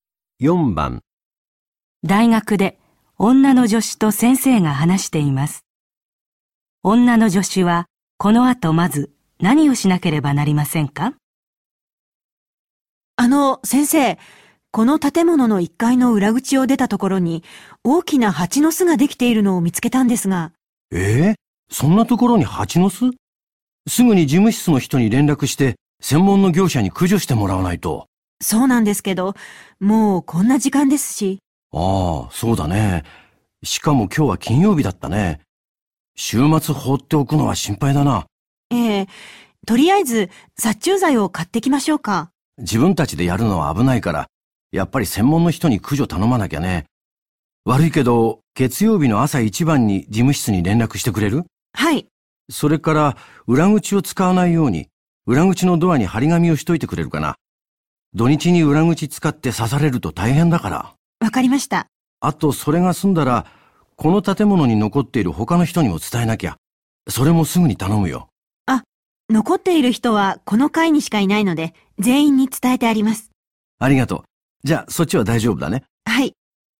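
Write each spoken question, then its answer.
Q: 女の助手は、この後まず何をしなければなりませんか?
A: 裏口のドアに張り紙をする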